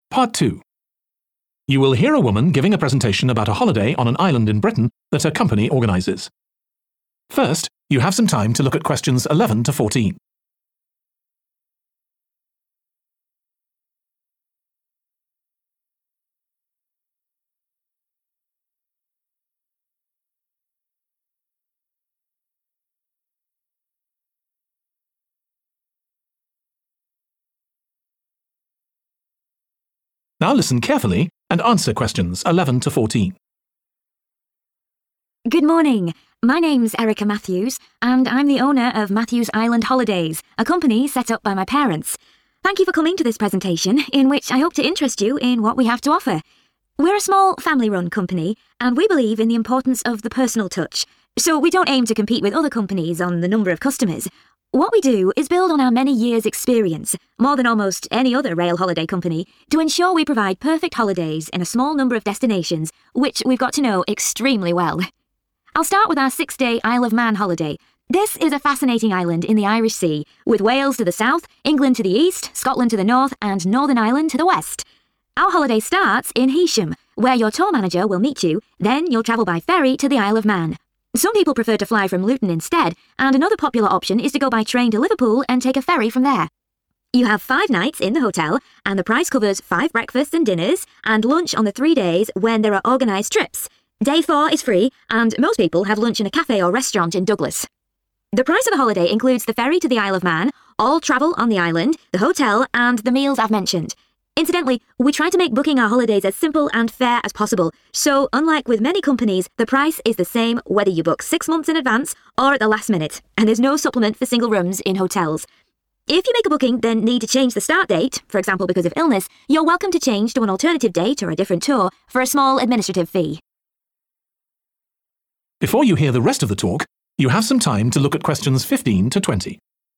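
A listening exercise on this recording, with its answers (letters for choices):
Choose the correct letter, A, B or C.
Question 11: According to the speaker, the company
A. has been in business for longer than most of its competitors.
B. arranges holidays to more destinations than its competitors.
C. has more customers than its competitors.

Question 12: Where can customers meet the tour manager before travelling to the Isle of Man?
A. Liverpool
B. Heysham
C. Luton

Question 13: How many lunches are included in the price of the holiday?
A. three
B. four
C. five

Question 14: Customers have to pay extra for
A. guaranteeing themselves a larger room.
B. booking at short notice.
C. transferring to another date.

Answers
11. A
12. B
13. A
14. C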